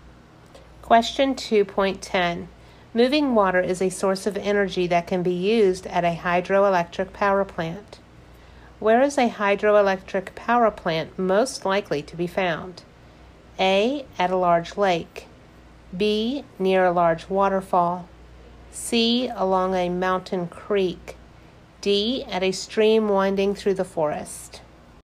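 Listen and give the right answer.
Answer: B: Near a large waterfall.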